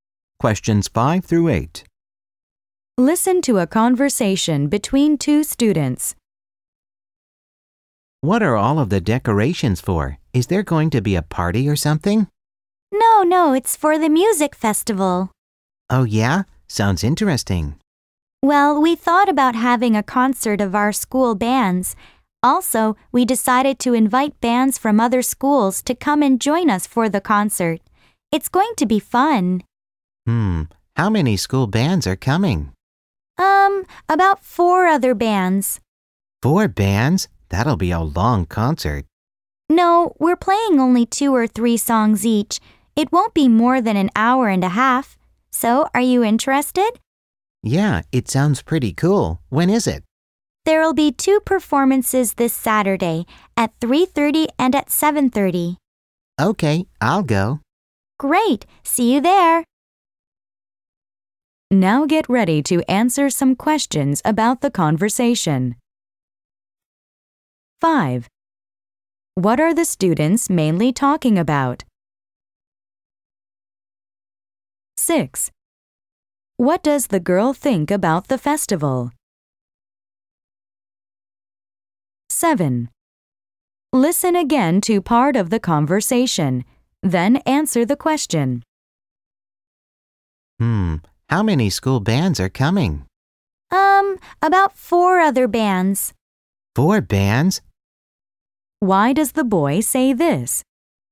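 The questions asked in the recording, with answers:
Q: What are the students mainly talking about?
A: The school music festival concert

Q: What does the girl think about the festival?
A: She thinks it sounds pretty cool and will go

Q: Why does the boy say this?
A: He is surprised and thinks the concert will be very long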